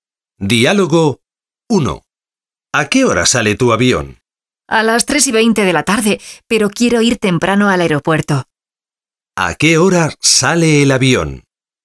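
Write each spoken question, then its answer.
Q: ¿A qué hora sale el avión?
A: A las 3:20 de la tarde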